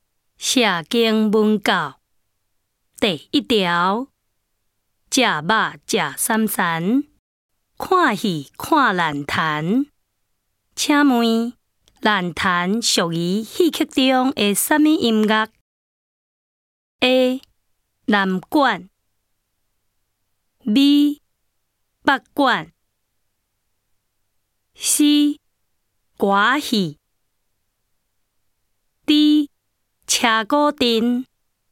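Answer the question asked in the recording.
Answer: B: 北管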